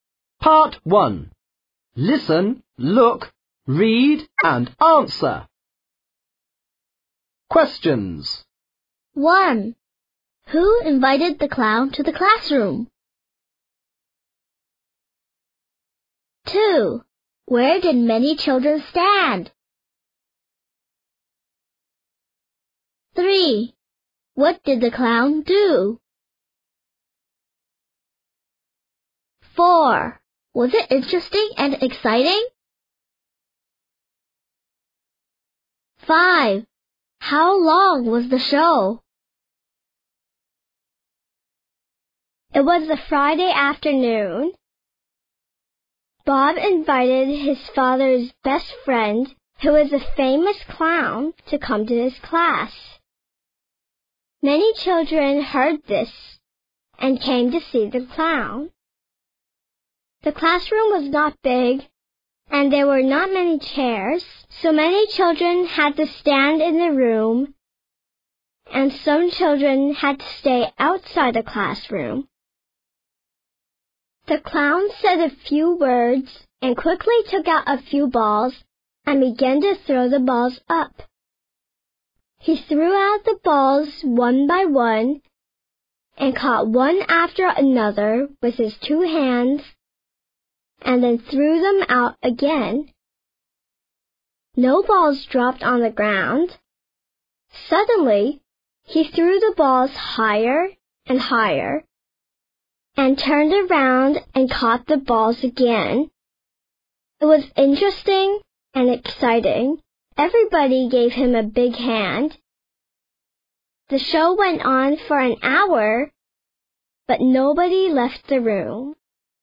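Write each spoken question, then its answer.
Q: Who invited the clown to the classroom?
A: Bob

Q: Where did many children stand?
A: In the classroom

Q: What did the clown do?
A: He threw balls up and caught them

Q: Was it interesting and exciting?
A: Yes, it was.

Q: How long was the show?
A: An hour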